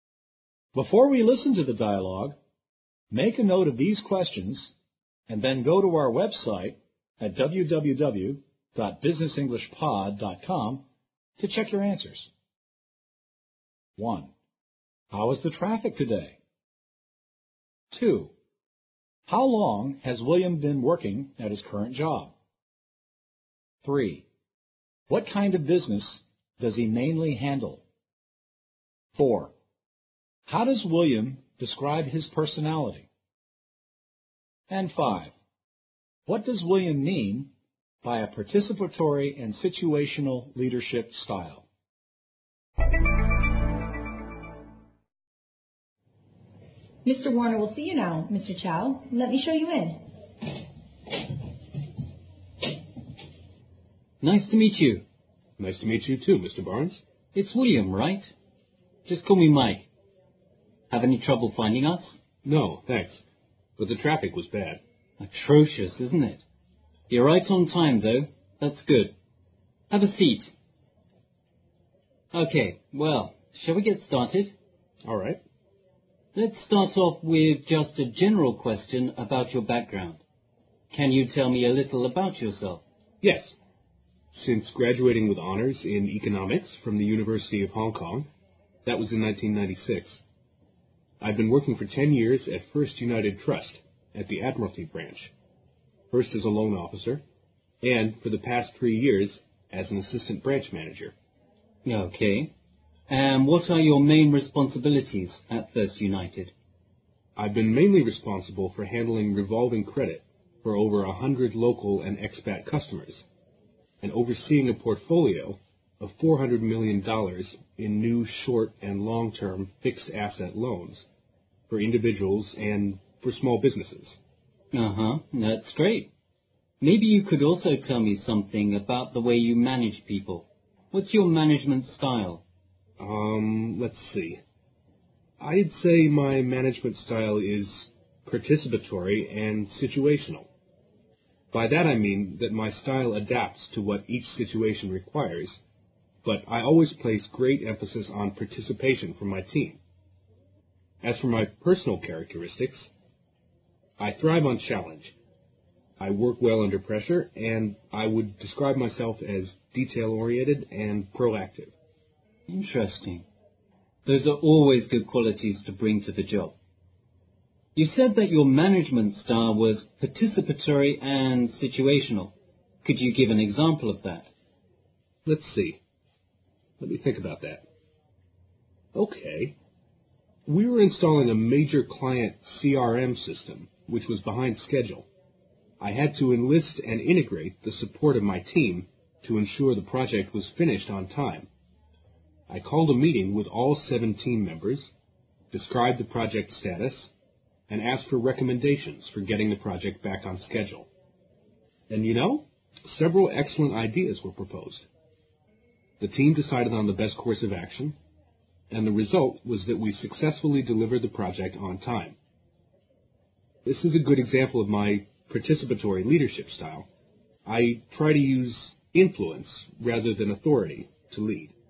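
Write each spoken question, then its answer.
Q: How is the traffic today?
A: Bad (atrocious)

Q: How long has William been working at his current job?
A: 10 years

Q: What kind of business does he mainly handle?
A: Revolving credit for local and expat customers, plus a portfolio of short and long-term fixed asset loans

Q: How does William describe his personality?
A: He thrives on challenge, works well under pressure, and is detail-oriented and proactive

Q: What does William mean by a participatory and situational leadership style?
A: His style adapts to each situation, but he always puts great emphasis on his team taking part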